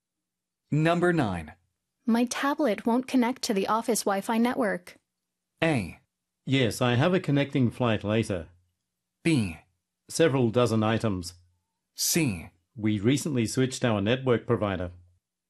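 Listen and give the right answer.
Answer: C: We recently switched our network provider.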